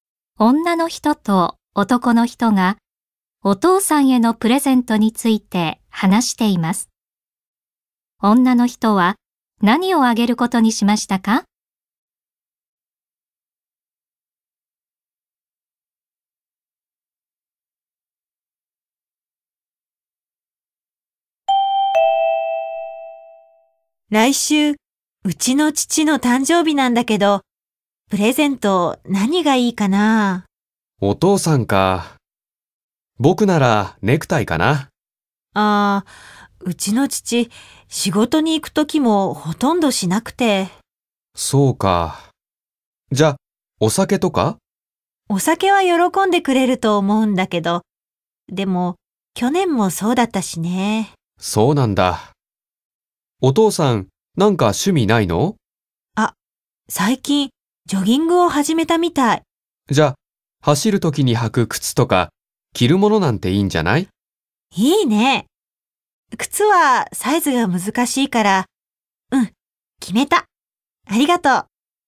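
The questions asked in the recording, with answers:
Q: 女の人は何をあげることにしましたか?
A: ジョギングの時に着る服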